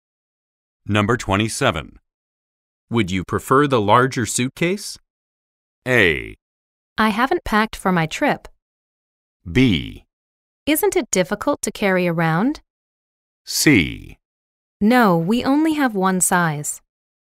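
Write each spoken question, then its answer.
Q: Would you prefer the larger suitcase?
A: B: Isn't it difficult to carry around?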